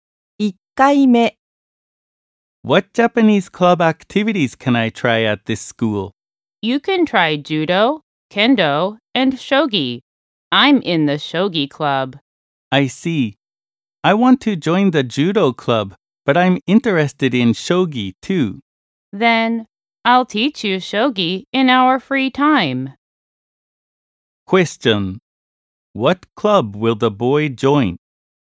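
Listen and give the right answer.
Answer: The judo club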